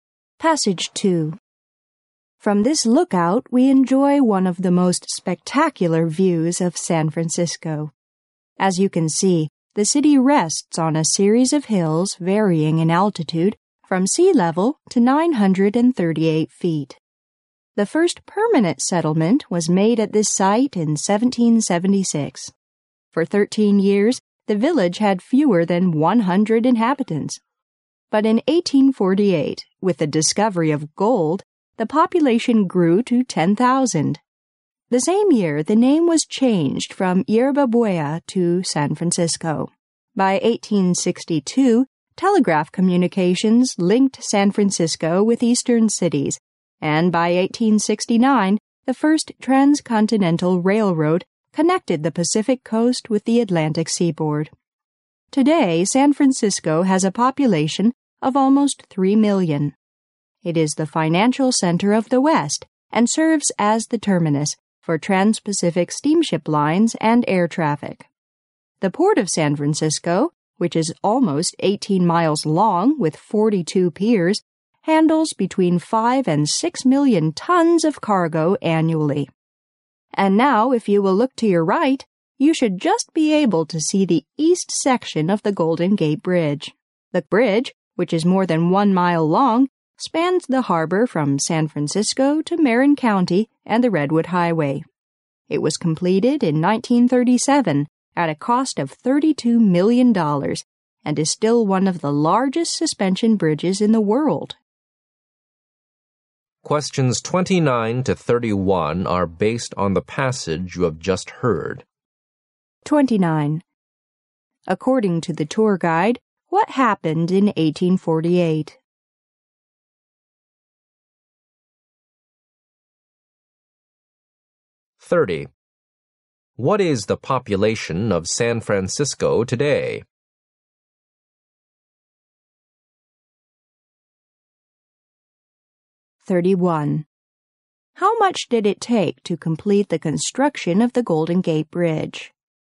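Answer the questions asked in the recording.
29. Gold was discovered and the population grew to 10,000
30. Almost 3 million
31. $32 million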